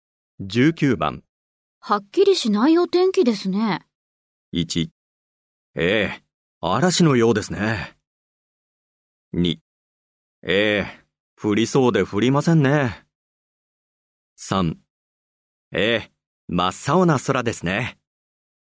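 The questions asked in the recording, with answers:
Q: はっきりしないお天気ですね。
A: 2: ええ、降りそうで降りませんね。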